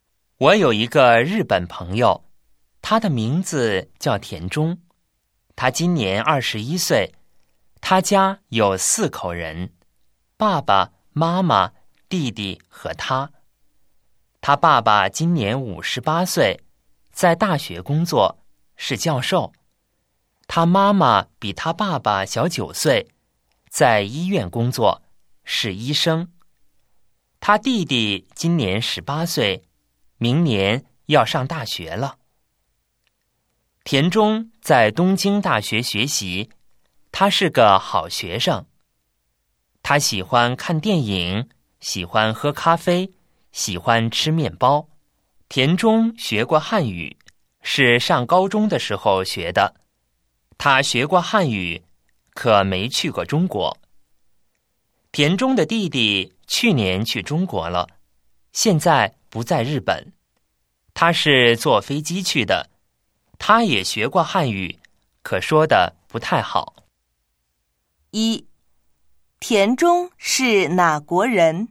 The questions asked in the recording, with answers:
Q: 田中是哪国人?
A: 他是日本人。